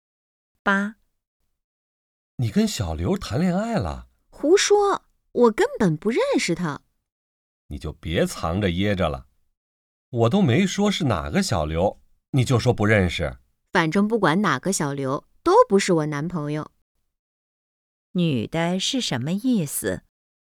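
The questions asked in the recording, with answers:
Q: 女的是什么意思?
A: 小刘不是她男朋友,她没有和小刘谈恋爱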